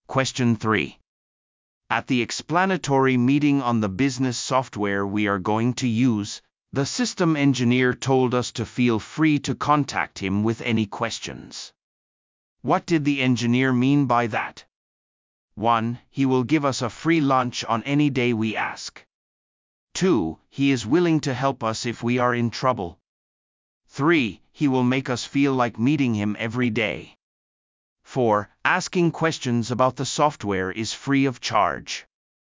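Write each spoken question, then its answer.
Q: What did the engineer mean by that?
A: 2: He is willing to help us if we are in trouble.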